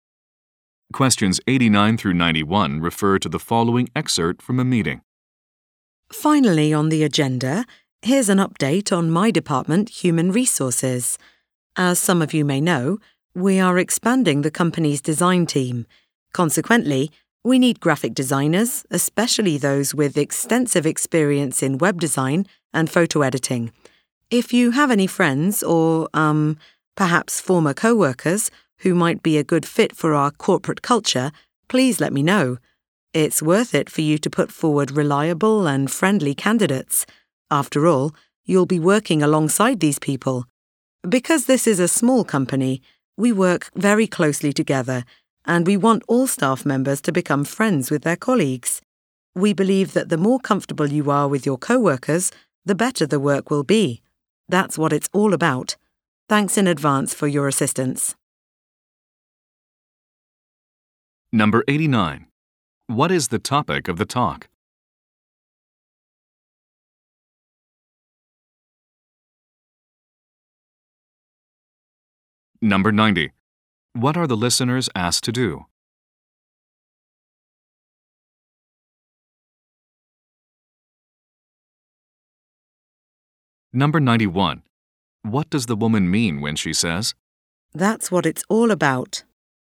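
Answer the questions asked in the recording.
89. Hiring graphic designers for the expanding design team
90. Recommend suitable candidates
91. Good relationships among co-workers are the key to better work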